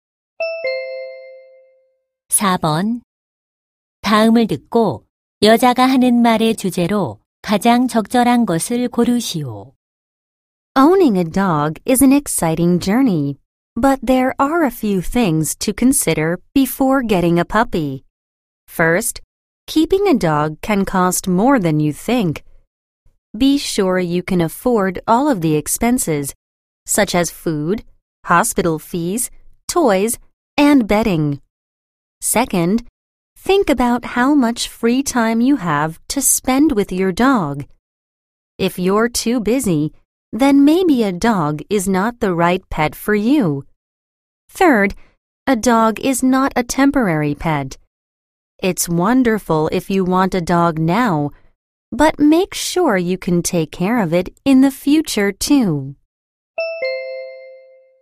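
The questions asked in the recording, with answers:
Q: 다음을 듣고 여자가 하는 말의 주제로 가장 적절한 것을 고르시오.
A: 개를 키우기 전에 고려해야 할 사항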